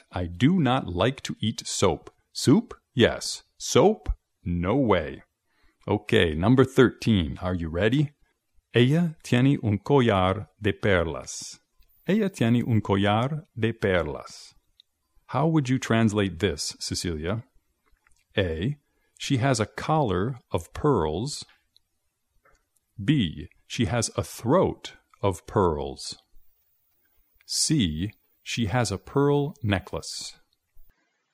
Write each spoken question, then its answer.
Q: How would you translate this, Cecilia?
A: Así que la correcta es C.